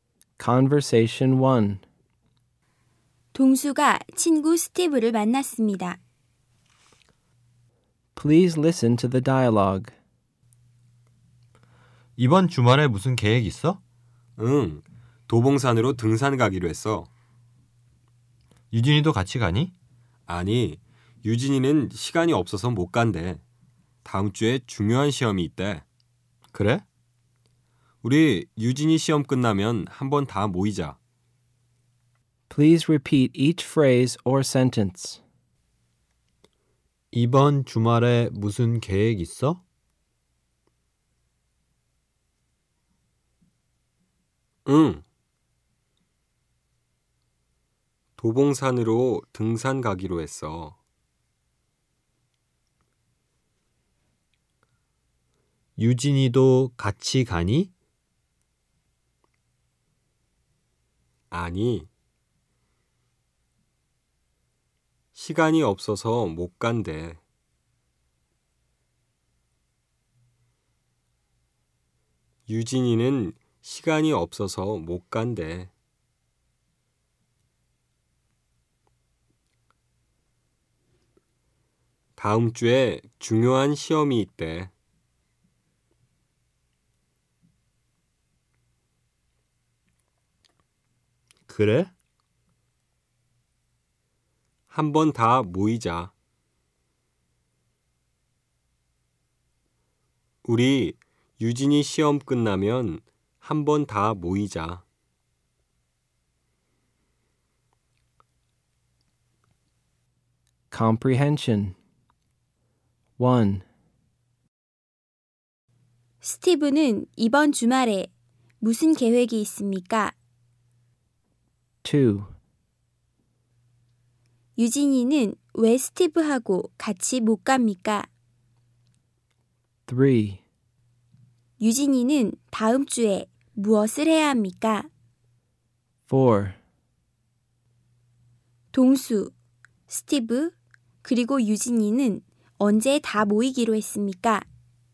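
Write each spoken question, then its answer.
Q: 스티브는 이번 주말에 무슨 계획이 있습니까?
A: 도봉산으로 등산 가기로 했습니다.

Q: 유진이는 왜 스티브하고 같이 못 갑니까?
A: 다음 주에 중요한 시험이 있어서 시간이 없습니다.

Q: 유진이는 다음 주에 무엇을 해야 합니까?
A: 중요한 시험을 봐야 합니다.

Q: 동수, 스티브, 그리고 유진이는 언제 다 모이기로 했습니까?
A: 유진이 시험이 끝나면 모이기로 했습니다.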